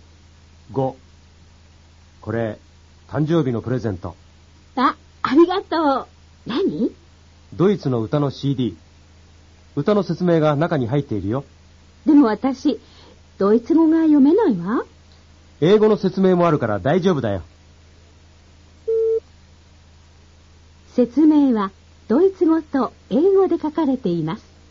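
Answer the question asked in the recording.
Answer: 正しい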